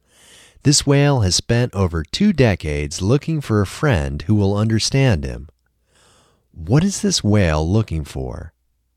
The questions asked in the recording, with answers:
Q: What is this whale looking for?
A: This whale is looking for a friend who will understand him.